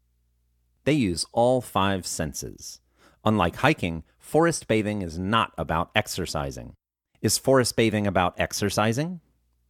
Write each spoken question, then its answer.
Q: Is forest bathing about exercising?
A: No, forest bathing is not about exercising.